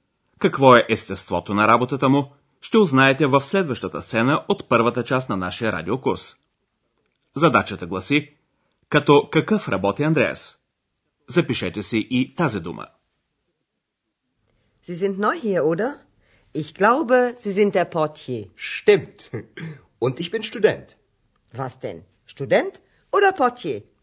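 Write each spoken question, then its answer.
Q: Като какъв работи Андреас?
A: Като портиер (Portier)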